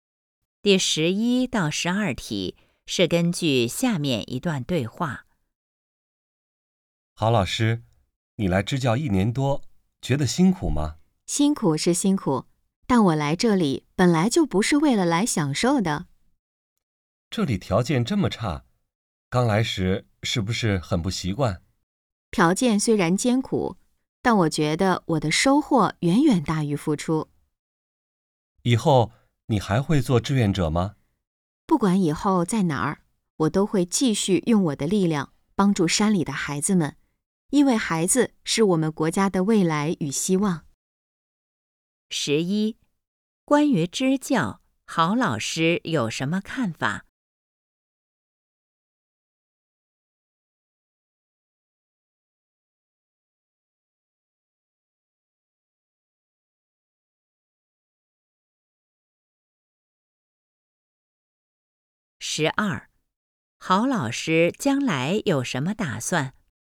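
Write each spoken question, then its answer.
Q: 关于支教,郝老师有什么看法?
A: 收获远远大于付出

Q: 郝老师将来有什么打算?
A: 继续帮助山里的孩子们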